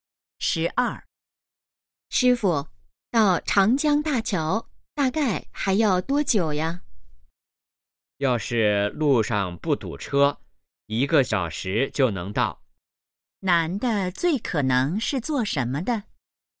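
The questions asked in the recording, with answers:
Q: 男的最可能是做什么的?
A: 司机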